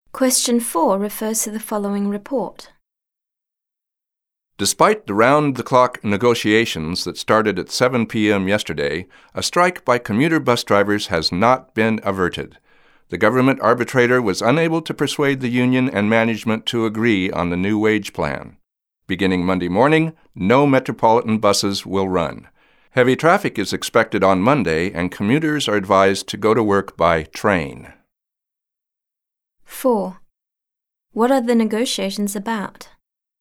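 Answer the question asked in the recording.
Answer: A new wage plan for commuter bus drivers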